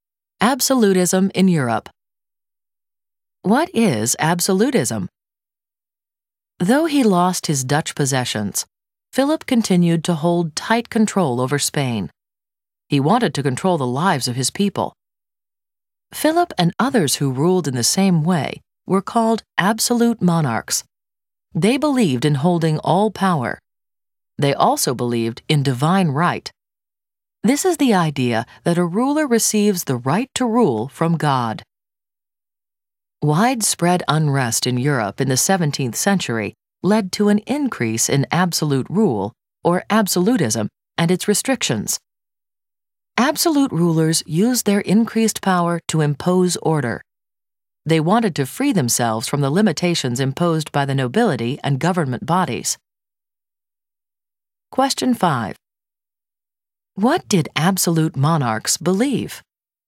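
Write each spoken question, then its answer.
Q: What did absolute monarchs believe?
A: In holding all power and in divine right to rule from God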